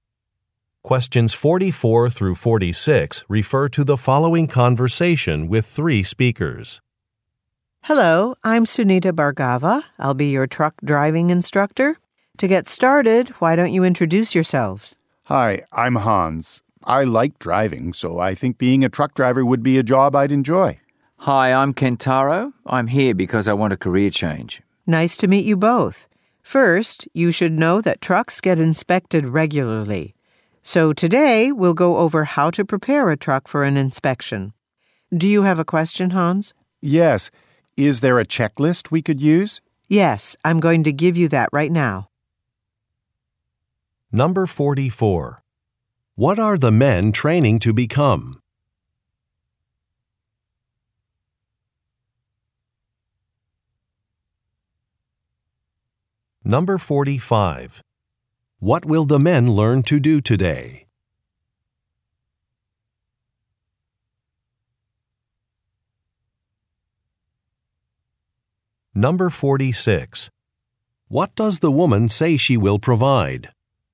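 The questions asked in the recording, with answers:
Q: What are the men training to become?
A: Truck drivers

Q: What will the men learn to do today?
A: Prepare a truck for an inspection

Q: What does the woman say she will provide?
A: A checklist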